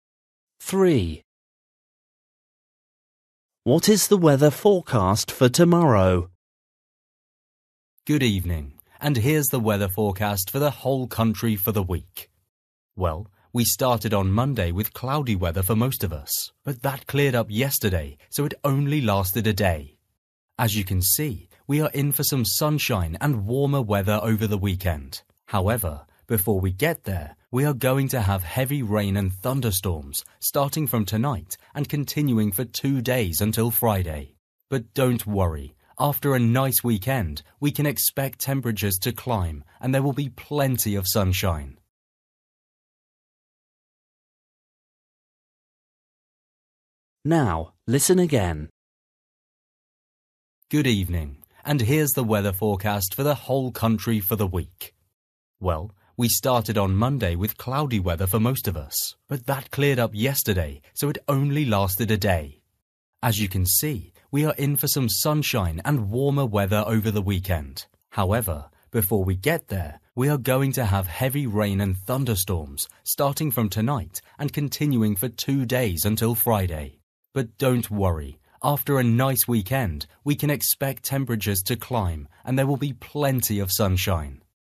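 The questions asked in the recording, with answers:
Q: What is the weather forecast for tomorrow?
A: heavy rain and thunderstorms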